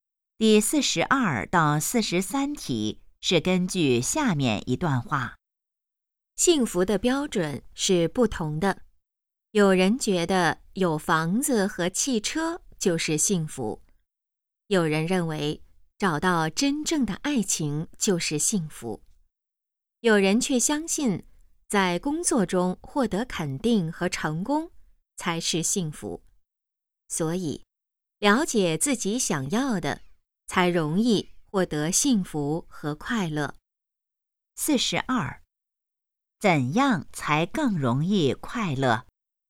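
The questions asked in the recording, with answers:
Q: 怎样才更容易快乐?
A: 了解自己想要的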